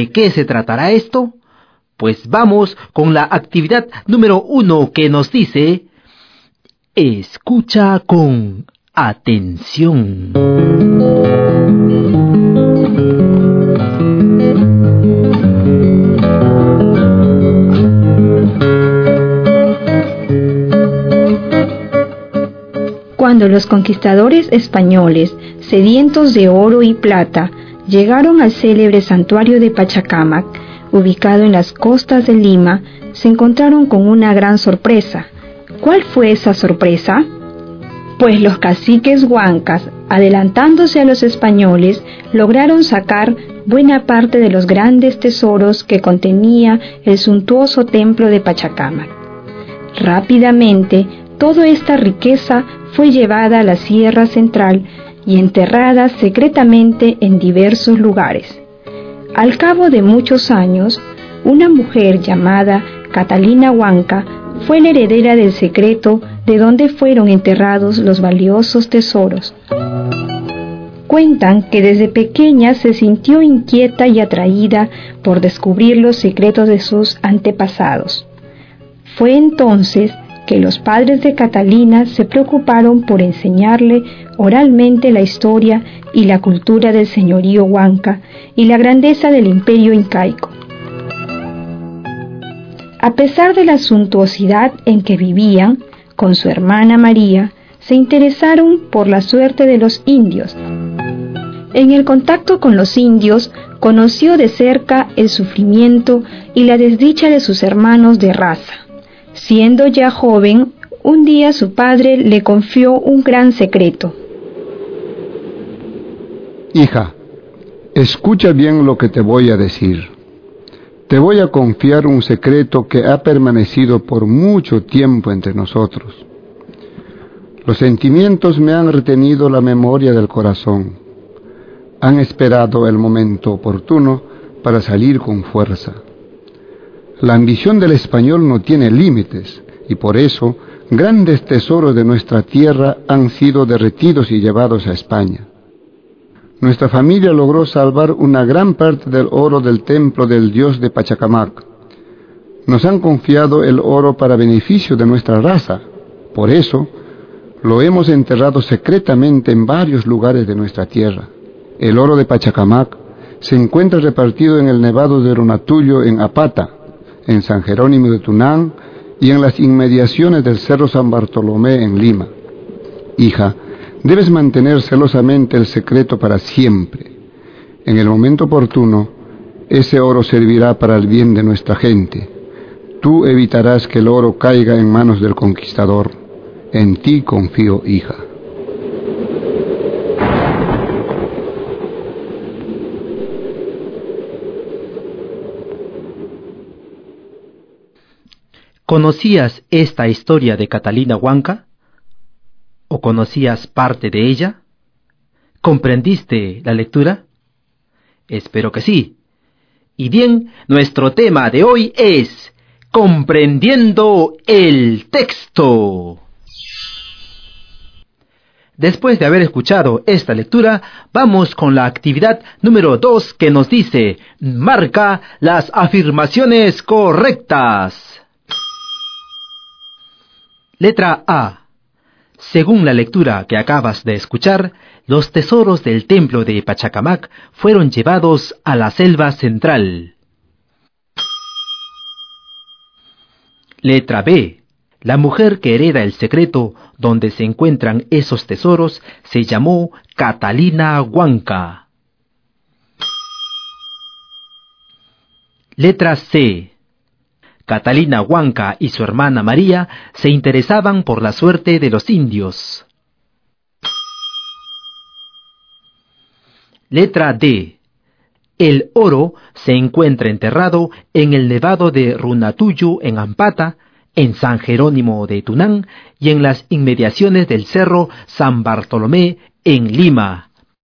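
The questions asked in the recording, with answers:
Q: Letra A. Según la lectura que acabas de escuchar, los tesoros del templo de Pachacamac fueron llevados a la selva central.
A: Es la letra A.

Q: Letra B. La mujer que hereda el secreto donde se encuentran esos tesoros se llamó Catalina Huanca.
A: Verdadero

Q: Letra C. Catalina Huanca y su hermana María se interesaban por la suerte de los indios.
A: Verdadero

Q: Letra D. El oro se encuentra enterrado en el nevado de Runatuyo en Ampata, en San Jerónimo de Tunán y en las inmediaciones del cerro San Bartolomé en Lima.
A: Verdadero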